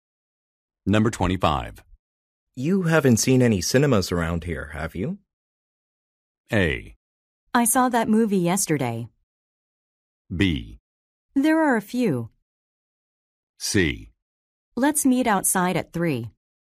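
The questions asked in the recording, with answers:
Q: You haven't seen any cinemas around here, have you?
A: B: There are a few.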